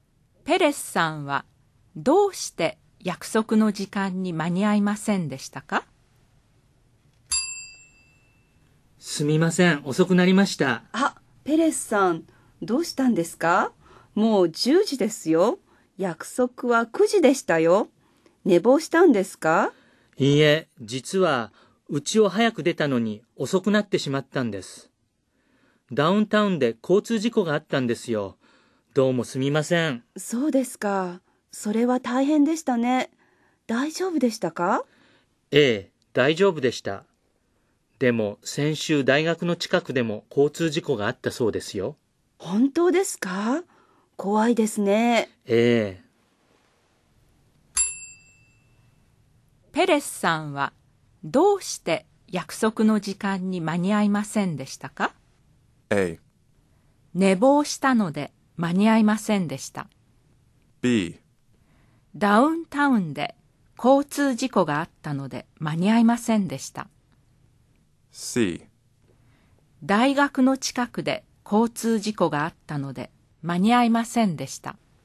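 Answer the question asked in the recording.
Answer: B: ダウンタウンで交通事故があったので間に合いませんでした。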